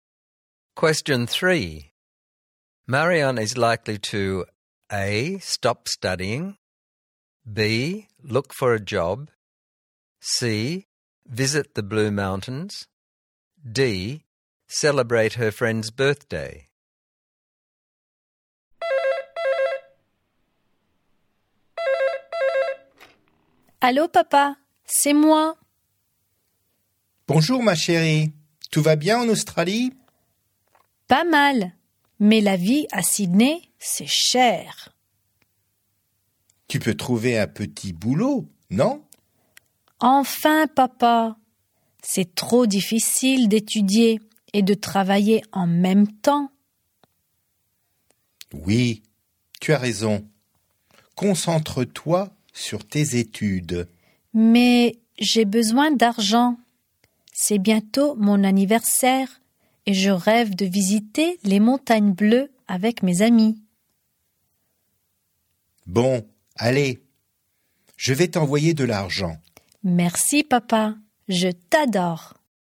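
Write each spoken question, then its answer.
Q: Marianne is likely to A. stop studying, B. look for a job, C. visit the Blue Mountains, D. celebrate her friend's birthday.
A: C: visit the Blue Mountains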